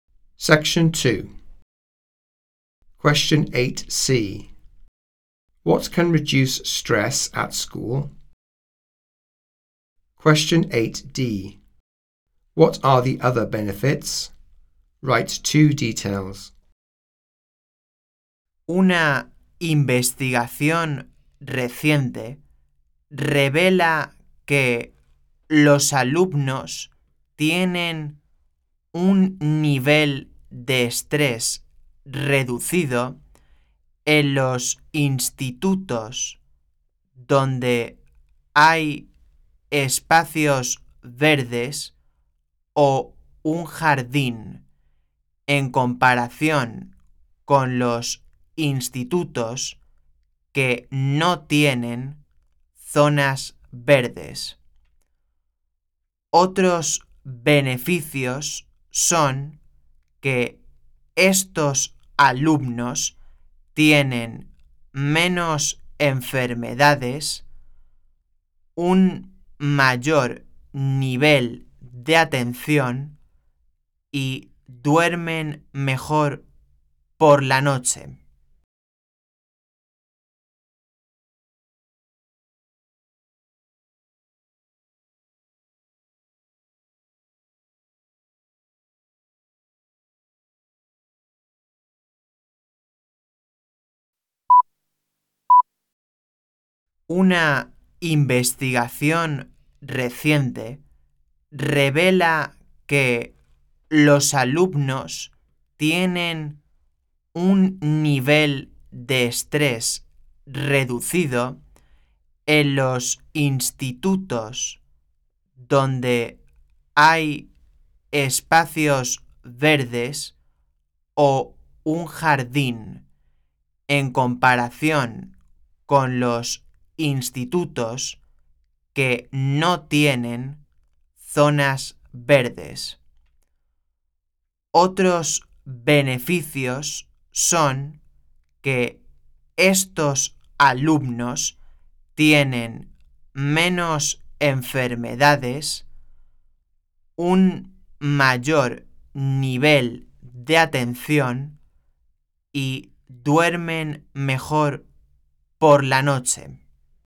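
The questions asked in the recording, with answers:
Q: What can reduce stress at school?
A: Green spaces or a garden

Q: What are the other benefits?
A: Fewer illnesses, better attention, sleep better at night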